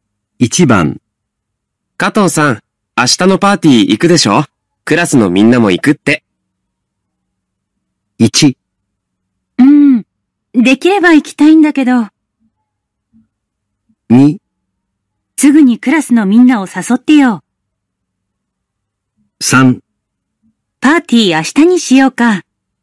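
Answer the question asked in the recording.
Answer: 1: うん。できれば行きたいんだけど。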